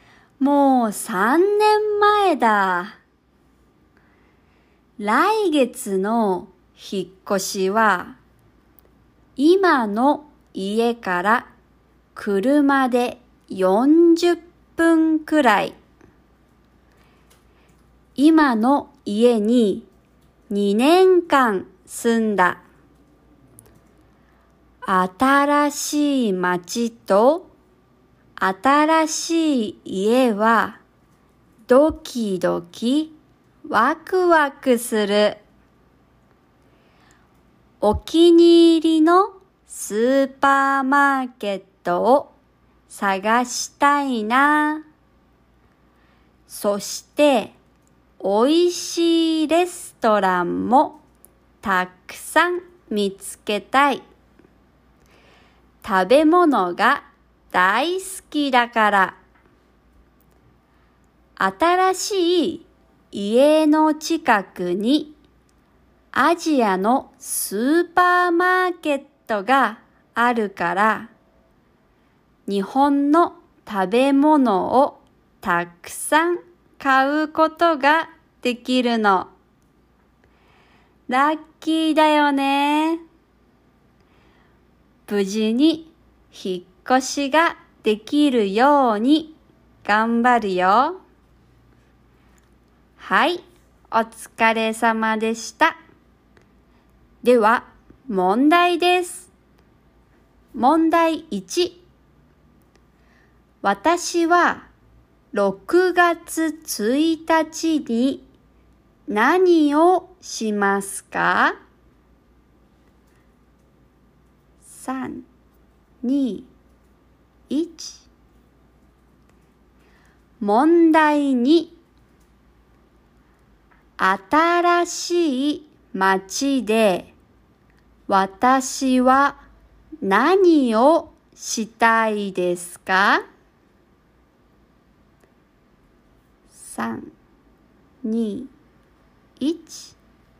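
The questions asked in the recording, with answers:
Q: 新しい街で私は何をしたいですか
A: お気に入りのスーパーマーケットを探して、美味しいレストランをたくさん見つけたい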